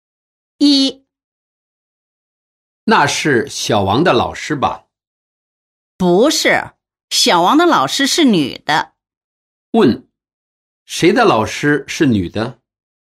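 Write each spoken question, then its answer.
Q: 问,谁的老师是女的?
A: 小王的老师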